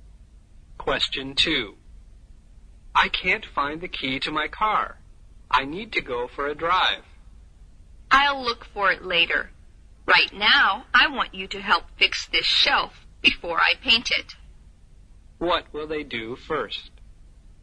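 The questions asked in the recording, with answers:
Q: What will they do first?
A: fix the shelf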